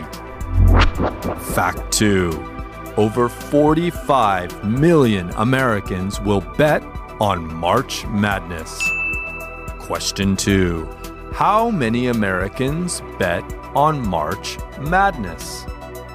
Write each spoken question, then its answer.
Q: How many Americans bet on March Madness?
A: Over 45 million Americans will bet on March Madness.